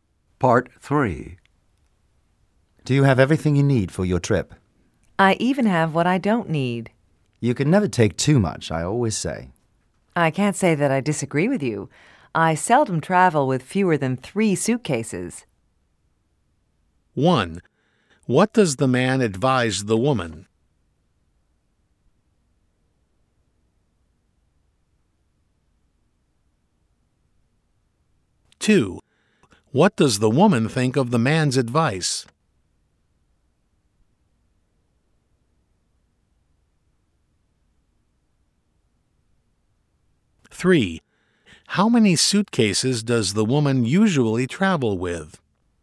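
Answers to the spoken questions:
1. To take plenty; you can never take too much
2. She agrees with it
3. At least three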